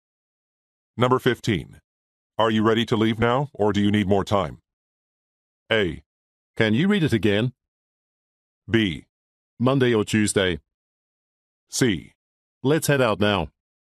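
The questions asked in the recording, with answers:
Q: Are you ready to leave now, or do you need more time?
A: C: Let's head out now.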